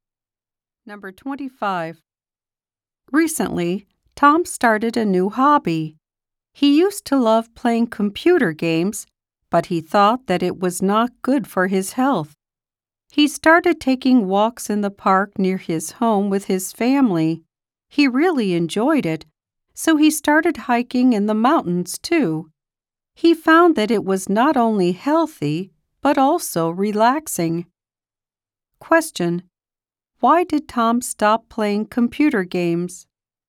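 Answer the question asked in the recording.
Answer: He thought they were not good for his health.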